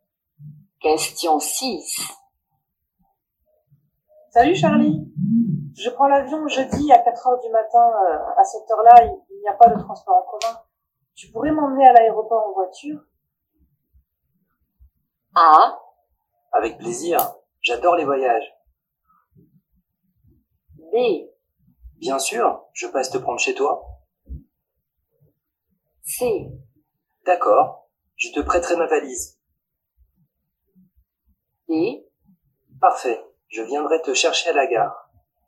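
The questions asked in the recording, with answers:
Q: Tu pourrais m'emmener à l'aéroport en voiture?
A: B: Bien sûr, je passe te prendre chez toi.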